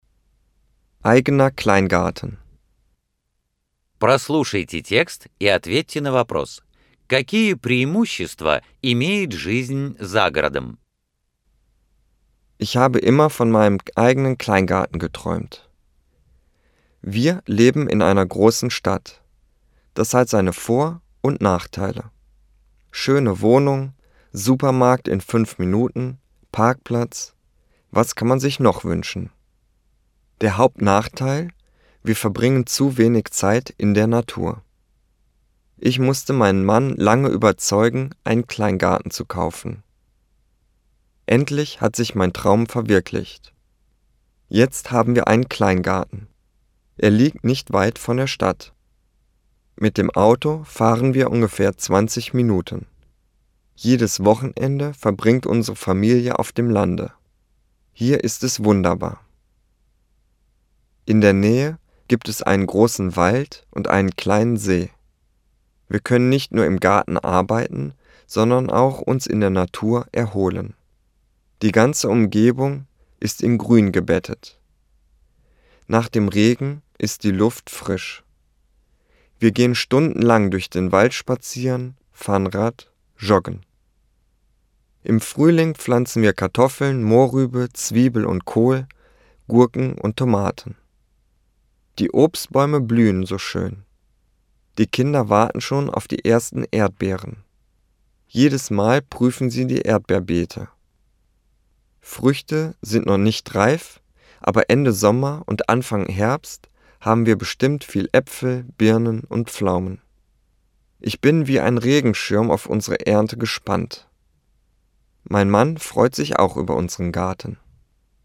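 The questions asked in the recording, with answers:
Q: Какие преимущества имеет жизнь за городом?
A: Больше времени на природе: рядом лес и озеро, свежий воздух, можно гулять, кататься на велосипеде, бегать, работать в саду и выращивать овощи и фрукты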